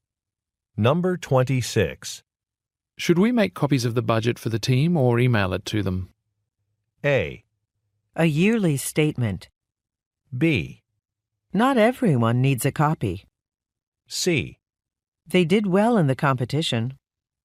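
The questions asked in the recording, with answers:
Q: Should we make copies of the budget for the team or email it to them?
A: B: Not everyone needs a copy.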